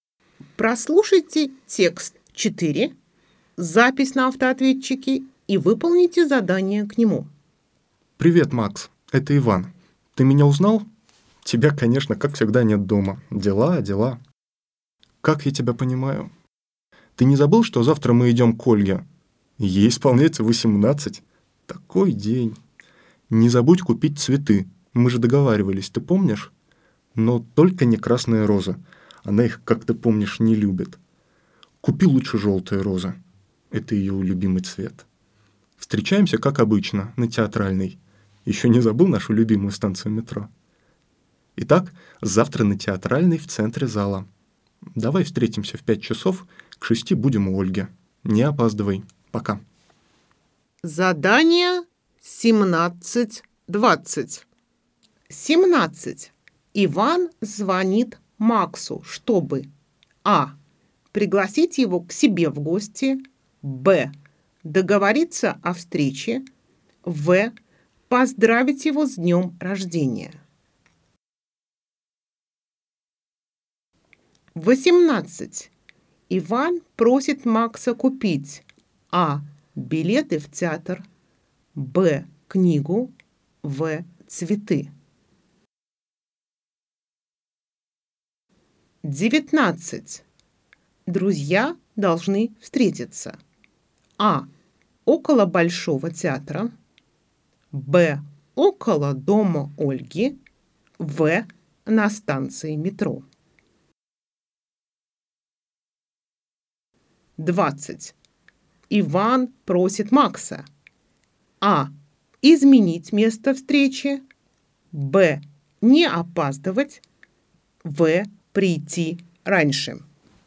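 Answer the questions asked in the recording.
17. Б: договориться о встрече
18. В: цветы
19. В: на станции метро
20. Б: не опаздывать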